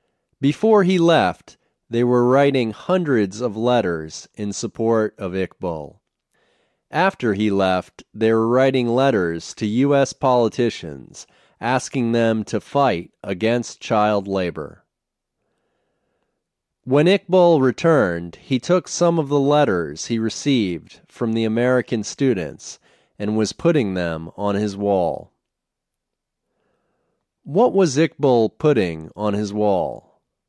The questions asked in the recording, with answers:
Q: What was Iqbal putting on his wall?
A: Iqbal was putting letters he received from the American students on his wall.